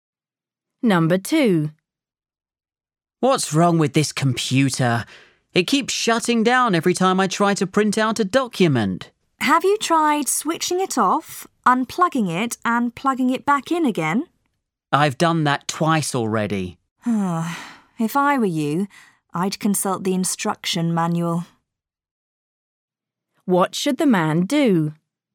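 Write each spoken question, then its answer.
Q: What should the man do?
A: consult the instruction manual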